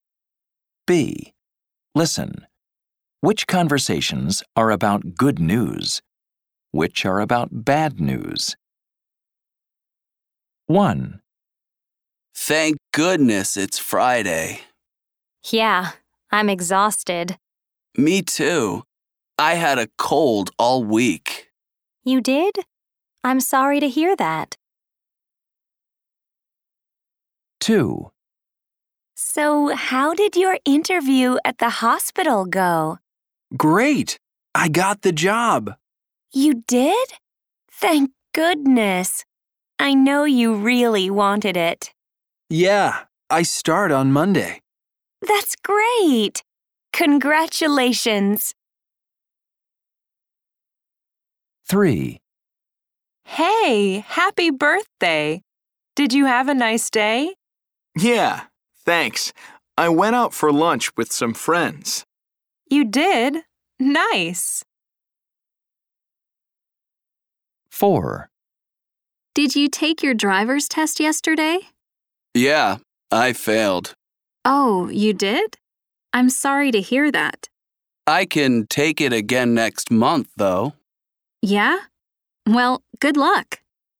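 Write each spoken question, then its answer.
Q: Which conversations are about good news? Which are about bad news?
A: bad news

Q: Which conversations are about good news? Which are about bad news?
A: good news

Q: Which conversations are about good news? Which are about bad news?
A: good news

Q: Which conversations are about good news? Which are about bad news?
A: bad news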